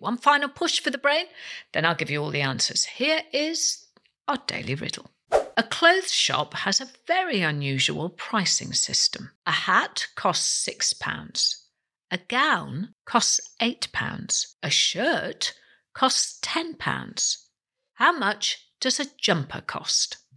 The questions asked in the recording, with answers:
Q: How much does a jumper cost?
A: The jumper costs £12.